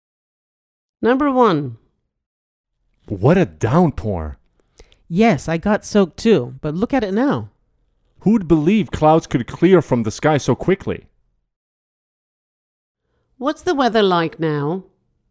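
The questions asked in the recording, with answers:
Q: What's the weather like now?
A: It has cleared up; the sky is clear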